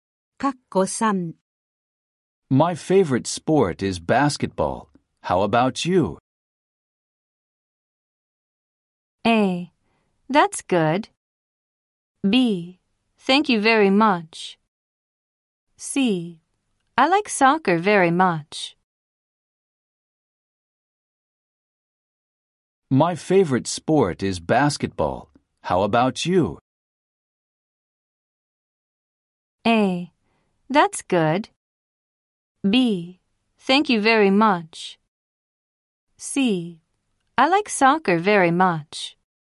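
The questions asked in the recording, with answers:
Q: How about you?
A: C: I like soccer very much.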